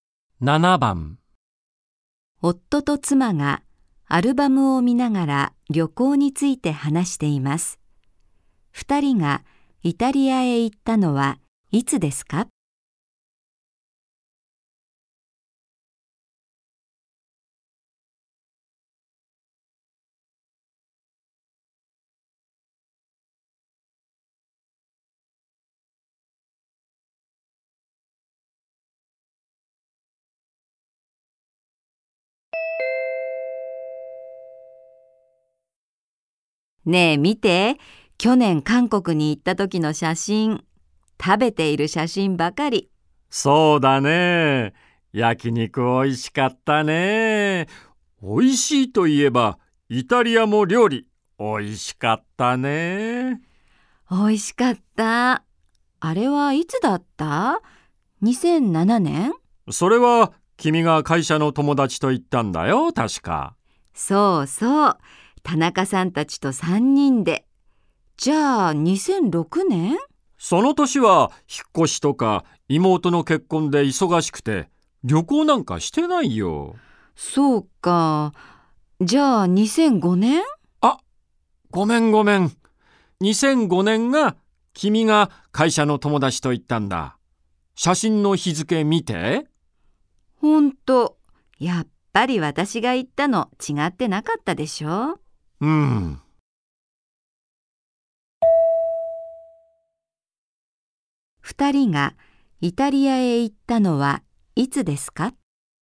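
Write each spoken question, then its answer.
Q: 2人がイタリアへ行ったのはいつですか?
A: 2007年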